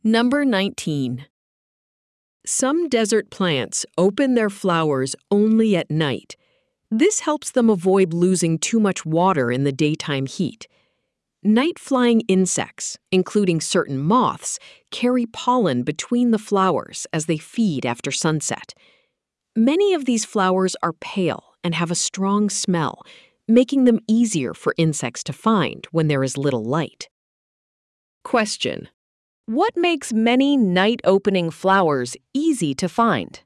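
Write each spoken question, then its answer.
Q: what makes many night-opening flowers easy to find?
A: They are pale and have a strong smell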